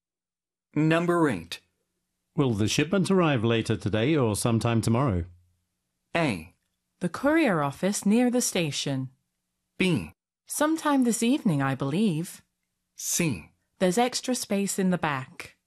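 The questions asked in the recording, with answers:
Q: Will the shipment arrive later today or sometime tomorrow?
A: B: Sometime this evening, I believe.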